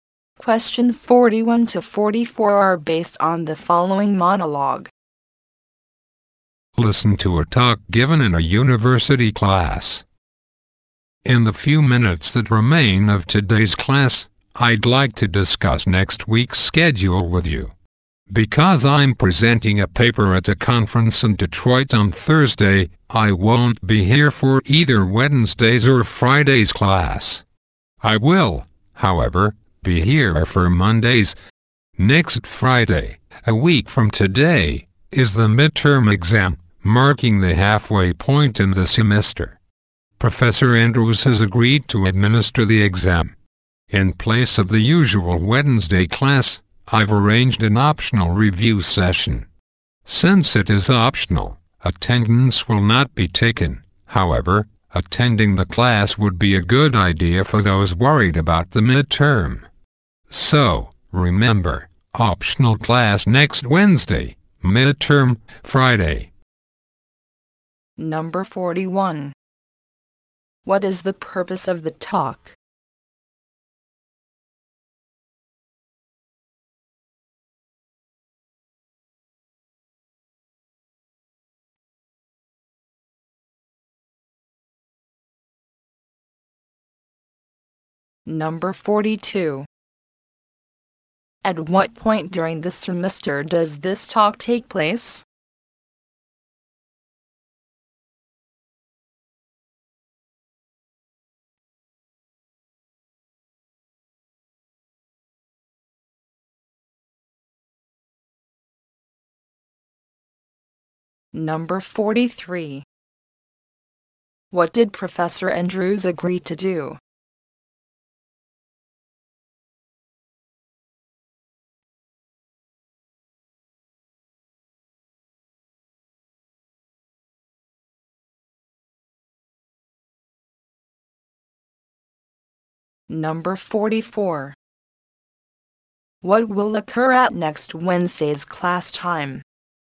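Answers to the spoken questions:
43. Give the midterm exam
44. An optional review session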